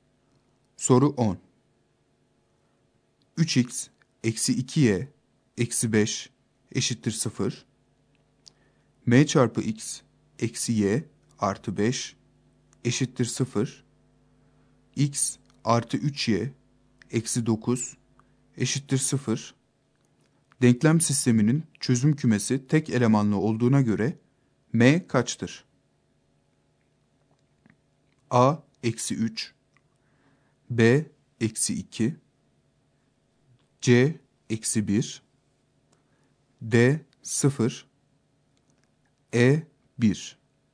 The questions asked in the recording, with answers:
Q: Denklem sisteminin çözüm kümesi tek elemanlı olduğuna göre M kaçtır?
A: Doğru yanıt C şıkkı.